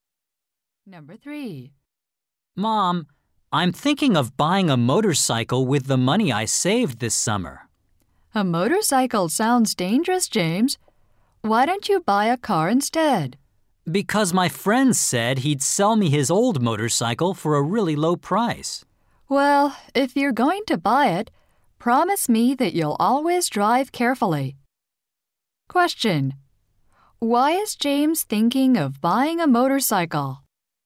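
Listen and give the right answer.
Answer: His friend will sell him one cheaply.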